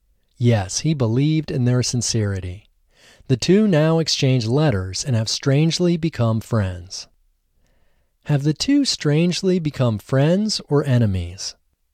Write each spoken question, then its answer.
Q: Have the two strangely become friends or enemies?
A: The two have strangely become friends.